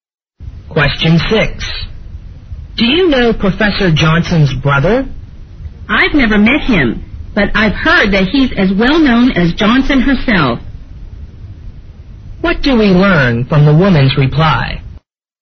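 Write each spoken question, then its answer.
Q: What do we learn from the woman's reply?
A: She has never met Johnson's brother but has heard he is as famous as Johnson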